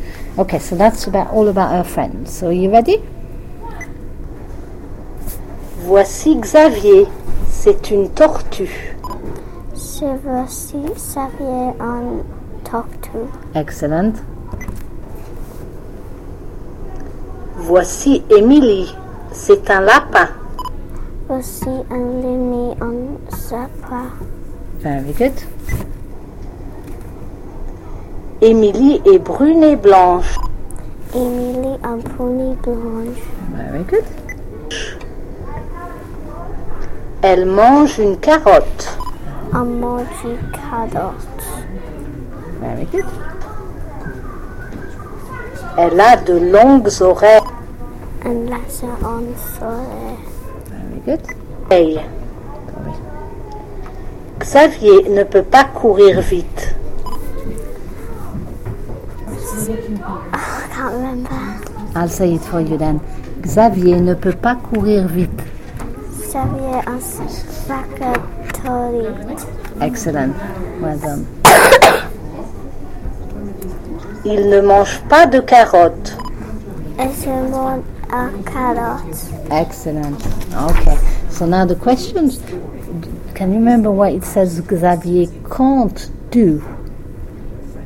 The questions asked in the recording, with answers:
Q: Can you remember what it says Xavier can't do?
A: It means he can't run fast.